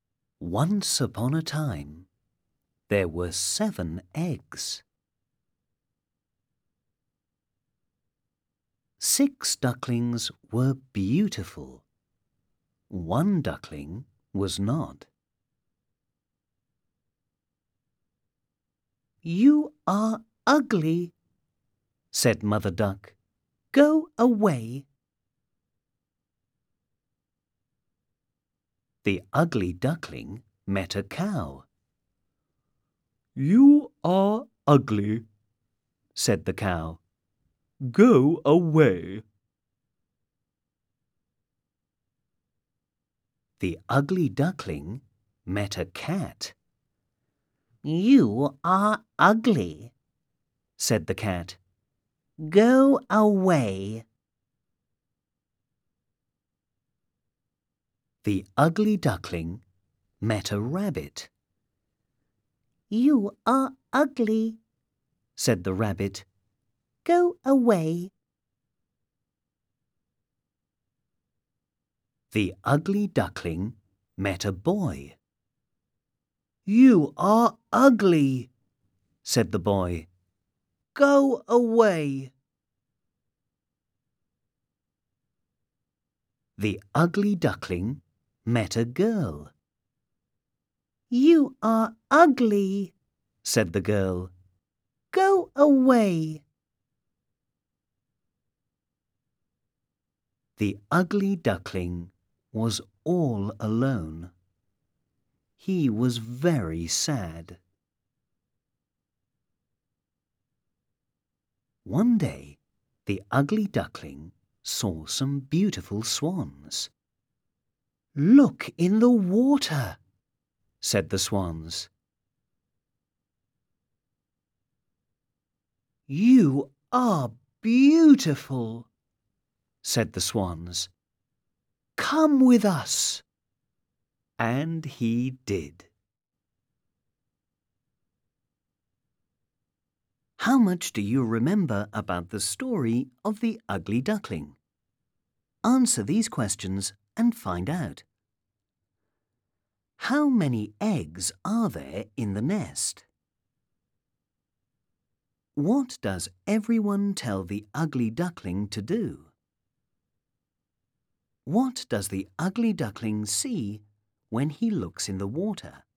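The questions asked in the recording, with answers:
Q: What does everyone tell the ugly duckling to do?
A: Go away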